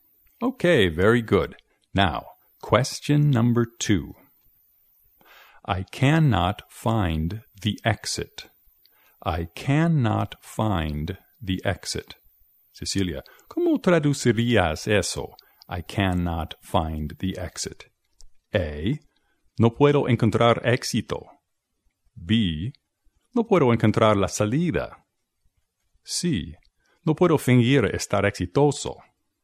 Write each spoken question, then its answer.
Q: I cannot find the exit.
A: I cannot find the exit. En español dirías no puedo encontrar la salida.